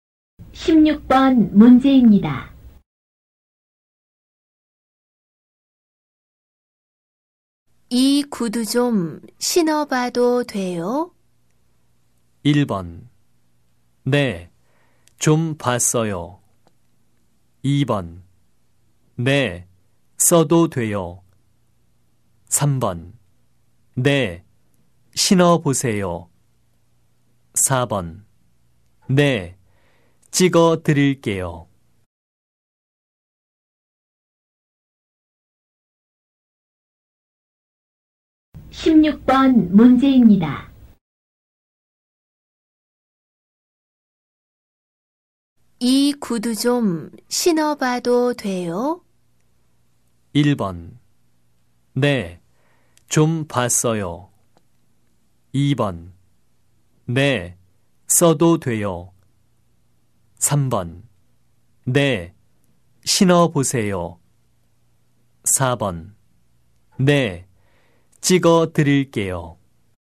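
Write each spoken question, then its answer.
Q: 이 구두 좀 신어봐도 돼요?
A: 3: 네, 신어보세요.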